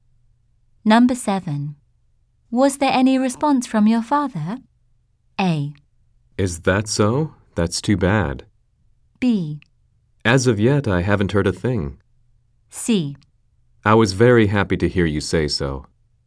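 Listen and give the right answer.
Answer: B: As of yet, I haven't heard a thing.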